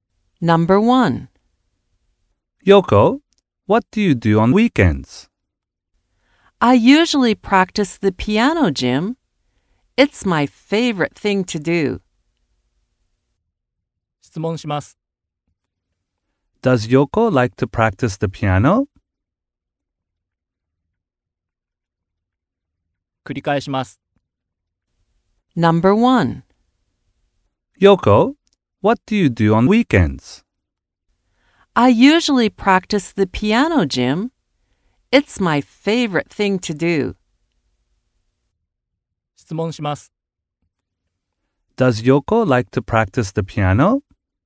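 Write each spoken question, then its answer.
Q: Does Yoko like to practice the piano?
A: Yes, she does.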